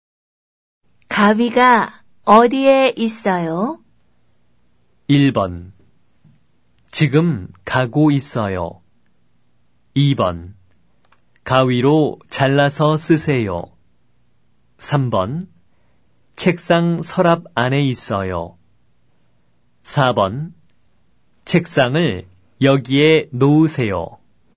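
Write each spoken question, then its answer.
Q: 바위가 어디에 있어요?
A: 3: 책상 서랍 안에 있어요.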